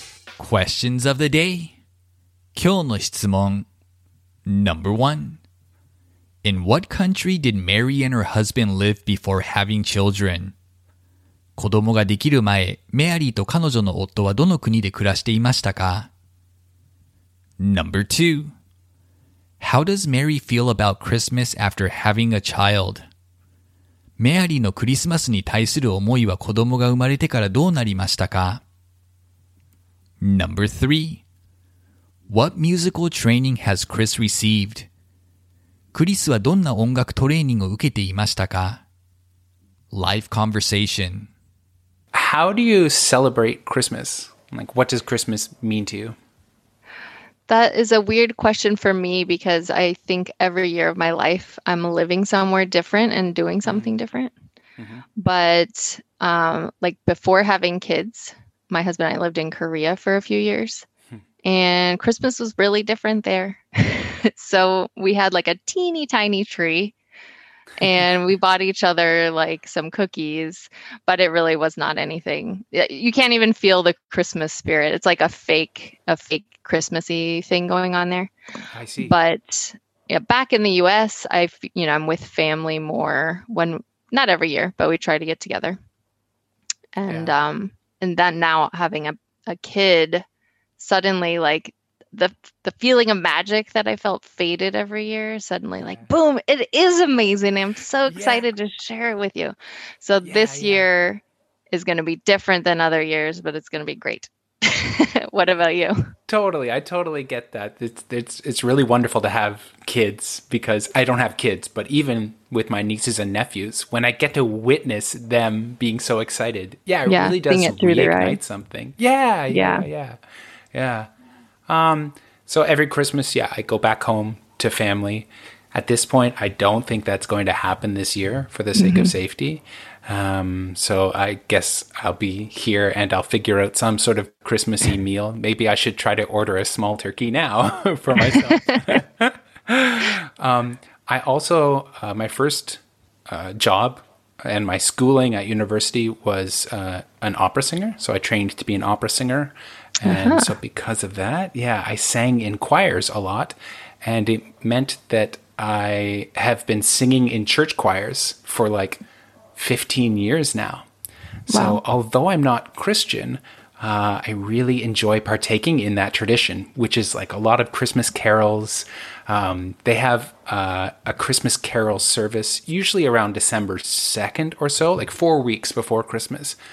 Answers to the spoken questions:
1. They both lived in Korea before having children.
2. Now that she has a child, she finds Christmas really exciting.
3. Chris trained to be an opera singer.